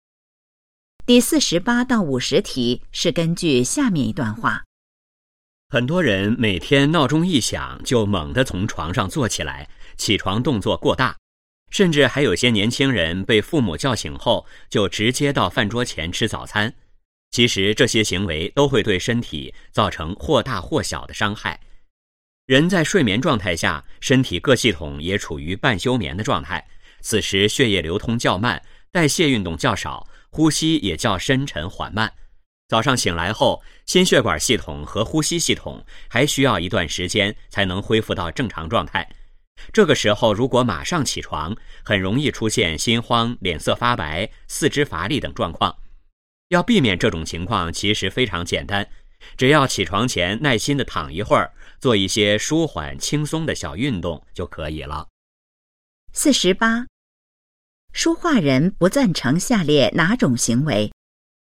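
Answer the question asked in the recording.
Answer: 闹钟一响就猛地从床上坐起来(醒来后马上起床)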